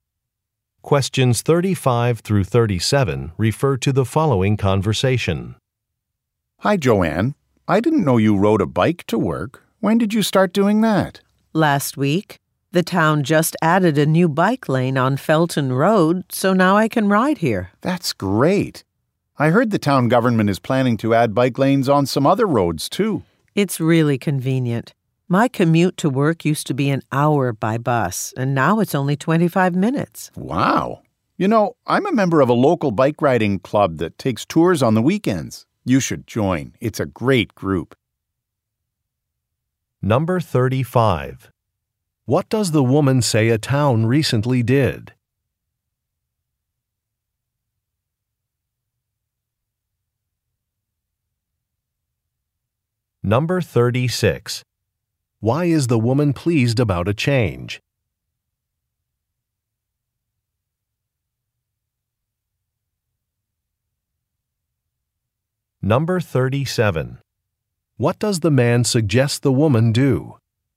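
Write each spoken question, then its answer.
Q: What does the woman say a town recently did?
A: Added a new bike lane

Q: Why is the woman pleased about a change?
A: Her commute is shorter

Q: What does the man suggest the woman do?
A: Join a bike riding club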